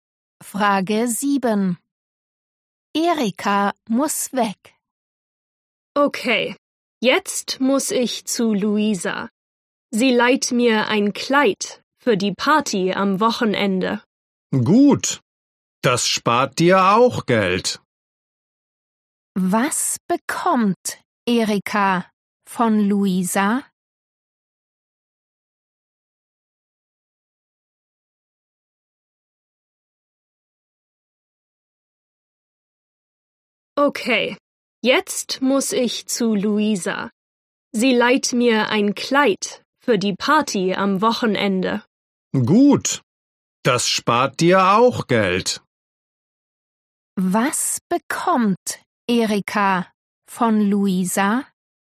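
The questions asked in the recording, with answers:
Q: Was bekommt Erika von Luisa?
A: ein Kleid (geliehen)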